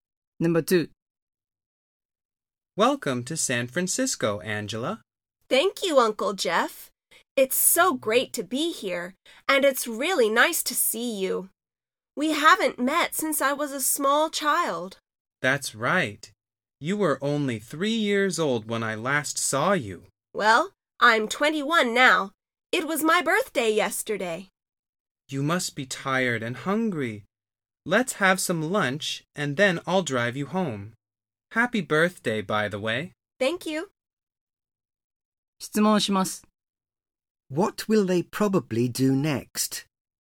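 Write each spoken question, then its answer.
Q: What will they probably do next?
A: Have some lunch.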